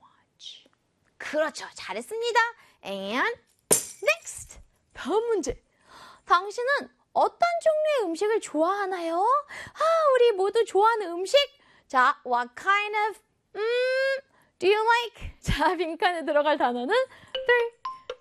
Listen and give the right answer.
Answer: 빈칸에는 바로 음식이라는 food!